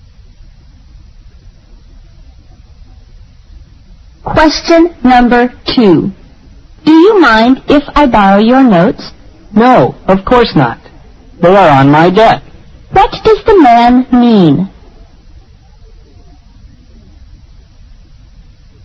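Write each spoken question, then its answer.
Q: What does the man mean?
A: He doesn't mind lending his notes; they are on his desk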